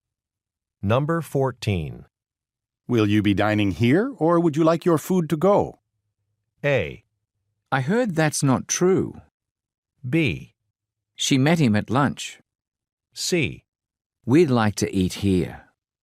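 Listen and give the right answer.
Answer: C: We'd like to eat here.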